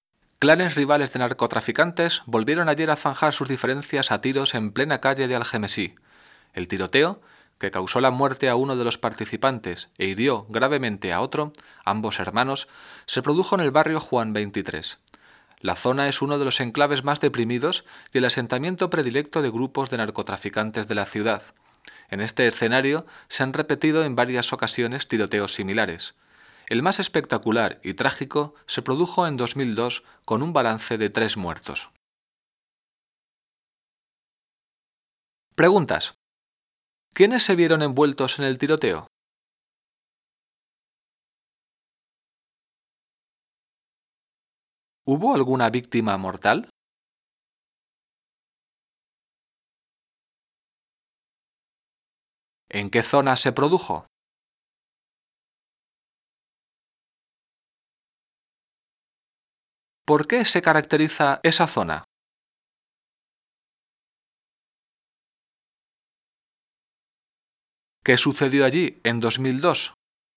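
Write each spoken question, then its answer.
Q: ¿Quiénes se vieron envueltos en el tiroteo?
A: Clanes rivales de narcotraficantes

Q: ¿Hubo alguna víctima mortal?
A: Sí, murió uno de los participantes

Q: ¿En qué zona se produjo?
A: En el barrio Juan 23 de Algemesí

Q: ¿Por qué se caracteriza esa zona?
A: Es uno de los enclaves más deprimidos y el asentamiento predilecto de narcotraficantes

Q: ¿Qué sucedió allí en 2002?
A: Un tiroteo con 3 muertos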